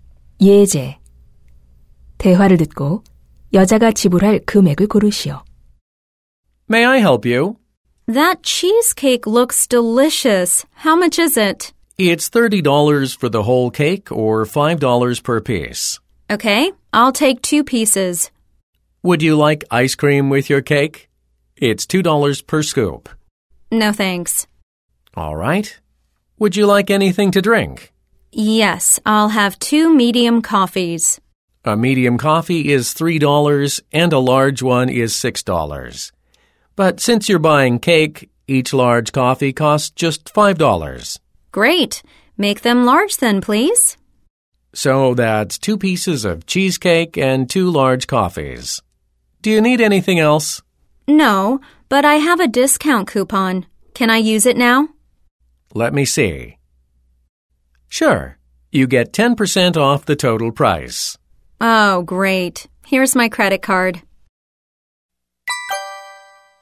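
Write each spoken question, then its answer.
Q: 대화를 듣고 여자가 지불할 금액을 고르시오.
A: $18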